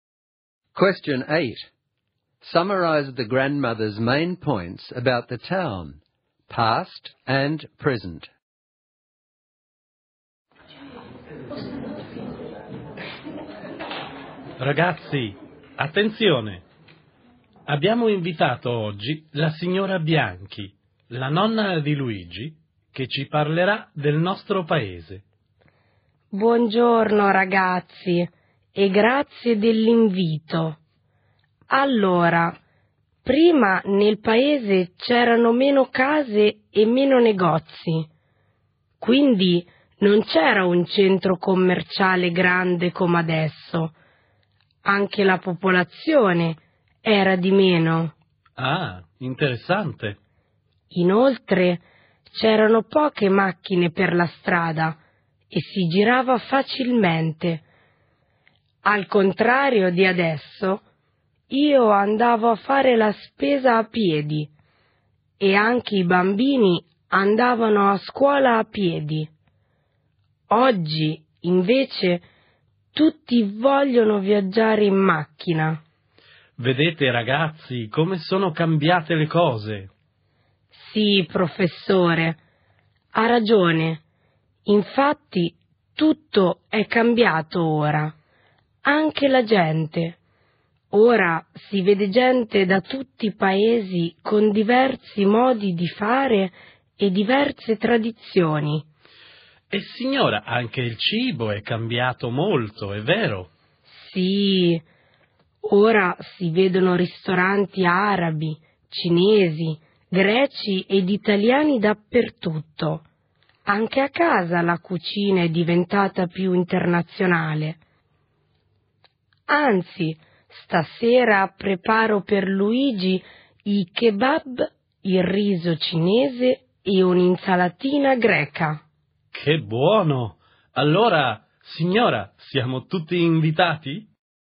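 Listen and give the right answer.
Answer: Before there were fewer houses, shops, people and cars and people walked everywhere; now there is a big shopping centre, everyone drives, and people from many countries have made the food international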